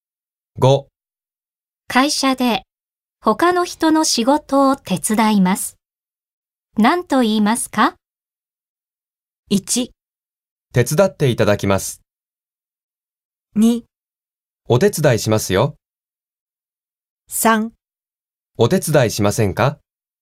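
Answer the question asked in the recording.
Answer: 2: お手伝いしますよ。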